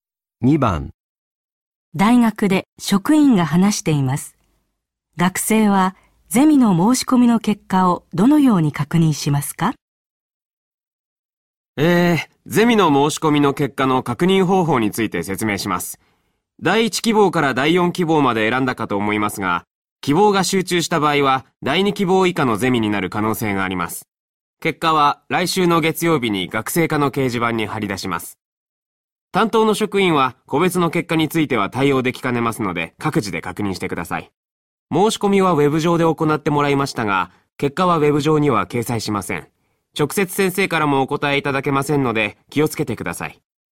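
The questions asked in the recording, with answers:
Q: 学生はゼミの申し込みの結果をどのように確認しますか?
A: 来週の月曜日に学生課の掲示板を見る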